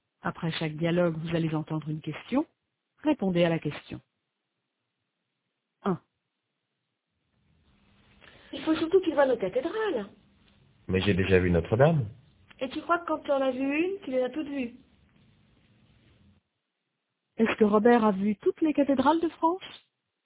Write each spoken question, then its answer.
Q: Est-ce que Robert a vu toutes les cathédrales de France?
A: Non, mais il a déjà vu Notre-Dame.